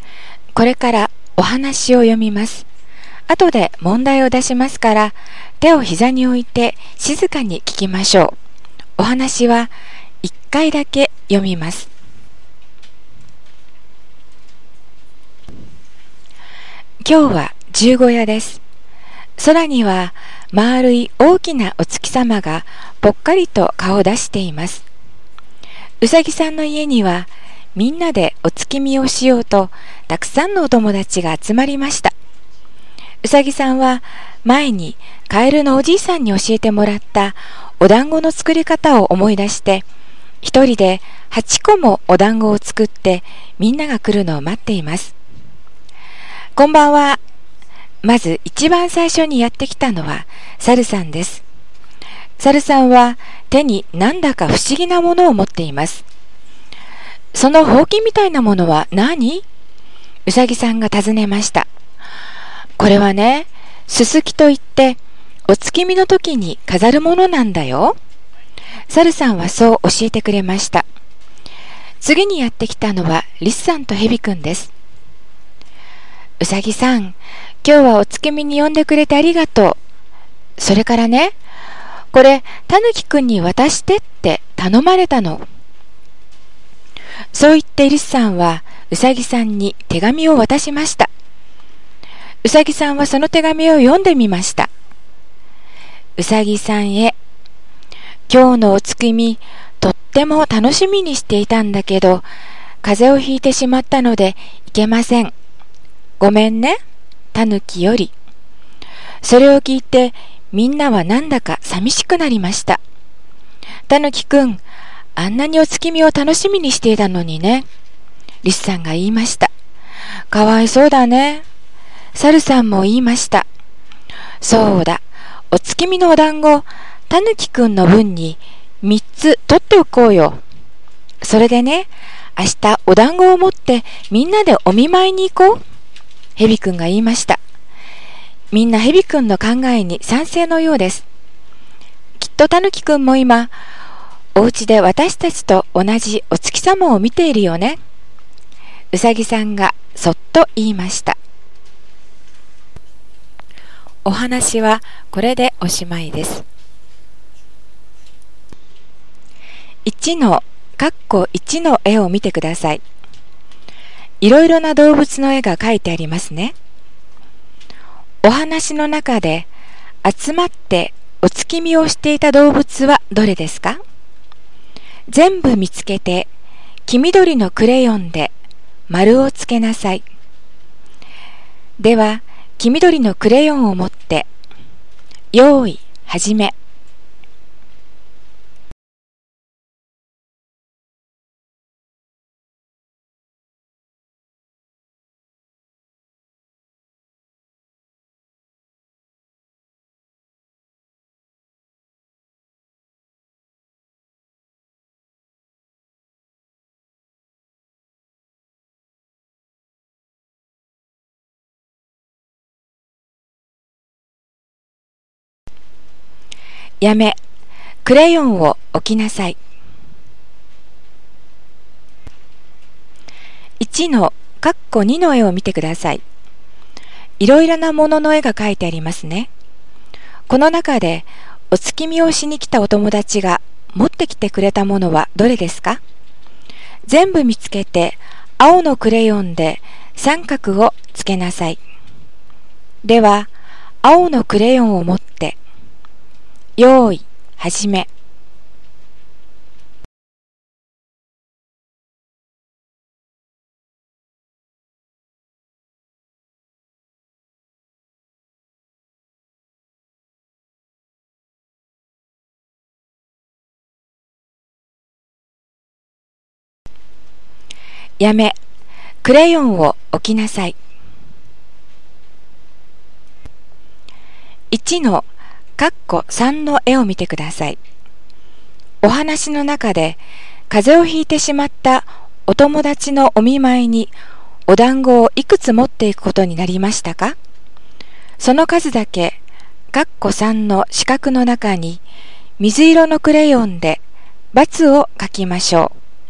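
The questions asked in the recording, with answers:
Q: お話の中で集まってお月見をしていた動物はどれですか?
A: うさぎ、サル、リス、ヘビ

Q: お話の中で風邪をひいてしまったお友達のお見舞いにお団子をいくつ持っていくことになりましたか?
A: 3つ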